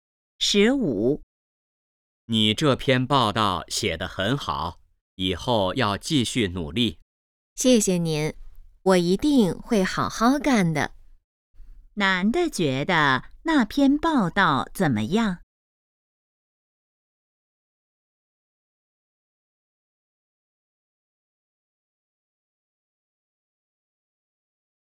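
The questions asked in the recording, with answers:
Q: 男的觉得那篇报道怎么样?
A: 写得很好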